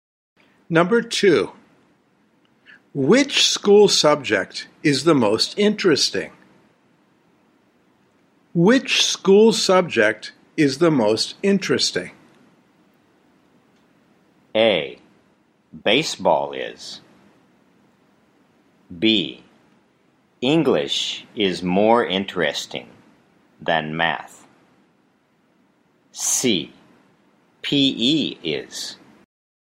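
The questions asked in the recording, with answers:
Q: Which school subject is the most interesting?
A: C: PE is.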